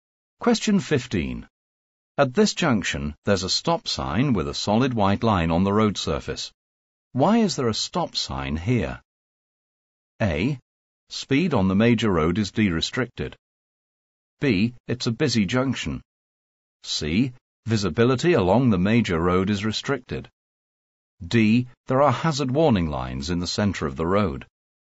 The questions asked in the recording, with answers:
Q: Why is there a stop sign here?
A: The correct answer is C. Visibility along the major road is restricted.